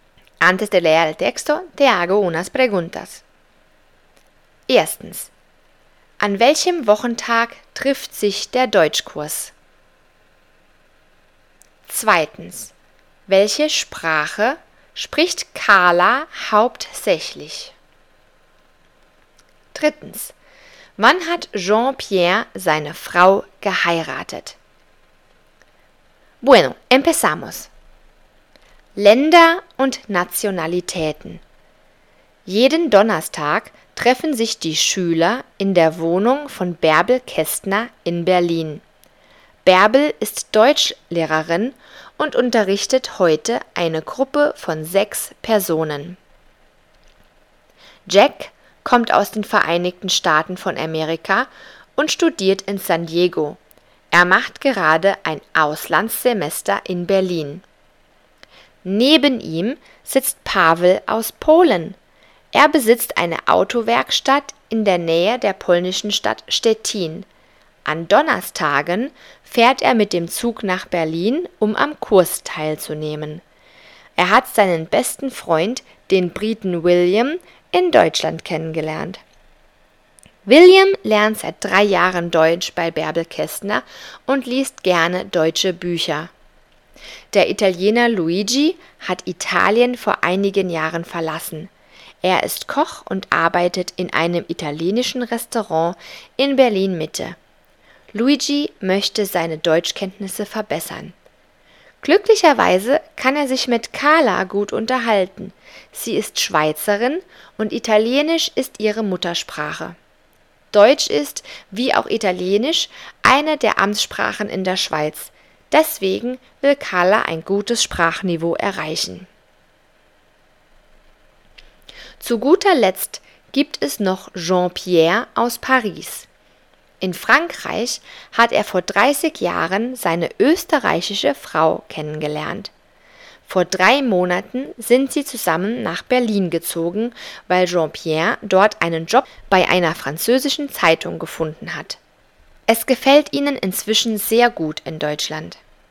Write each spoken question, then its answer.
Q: An welchem Wochentag trifft sich der Deutschkurs?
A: Richtig, das war am Donnerstag.

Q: Welche Sprache spricht Carla hauptsächlich?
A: Sie spricht Italienisch, das ist ihre Muttersprache.